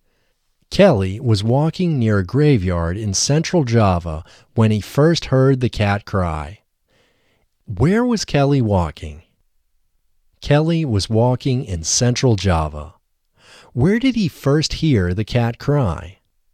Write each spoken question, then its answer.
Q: Where did he first hear the cat cry?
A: He first heard the cat cry near a graveyard.